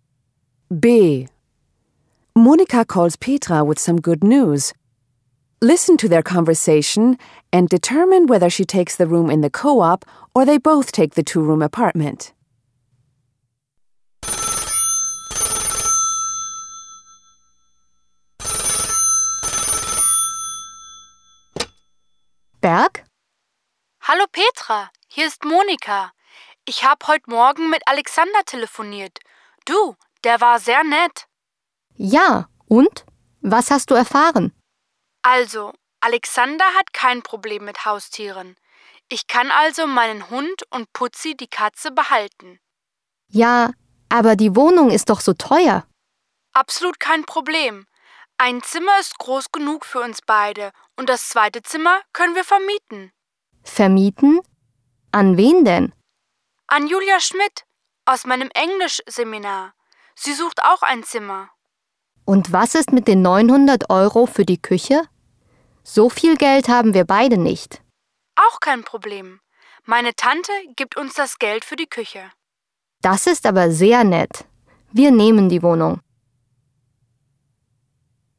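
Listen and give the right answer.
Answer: They both take the two-room apartment.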